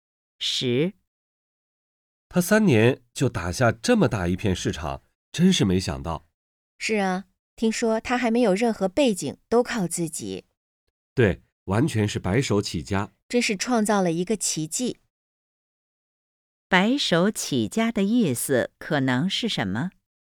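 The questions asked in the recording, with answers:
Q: 白手起家的意思可能是什么?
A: 没有任何背景,完全靠自己创业成功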